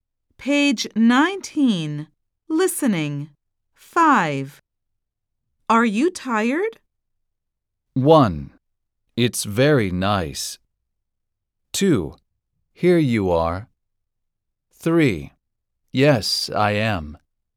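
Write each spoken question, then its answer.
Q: Are you tired?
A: 3: Yes, I am.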